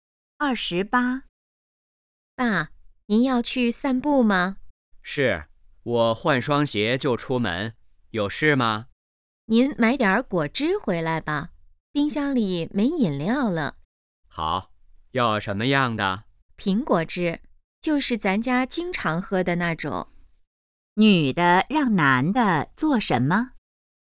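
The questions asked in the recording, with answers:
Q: 女的让男的做什么?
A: 买苹果汁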